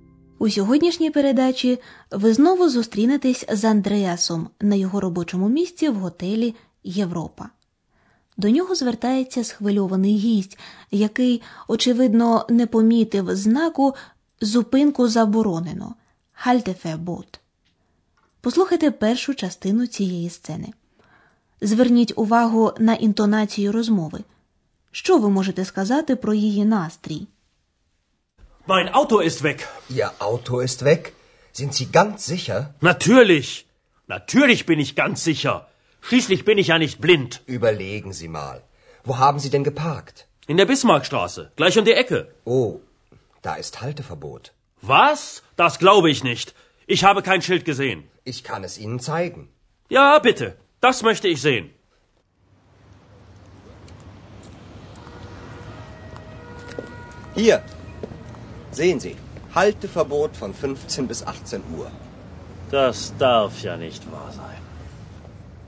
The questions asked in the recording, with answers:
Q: Що ви можете сказати про її настрій?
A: Гість готелю дуже схвильований і розгніваний